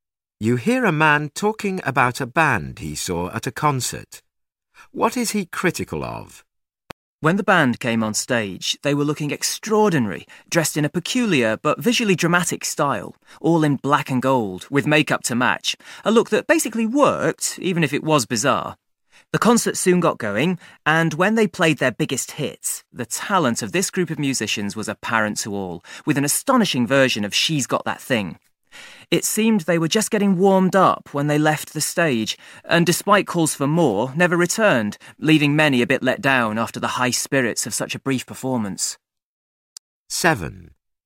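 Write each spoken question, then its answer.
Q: What is he critical of?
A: The concert was too short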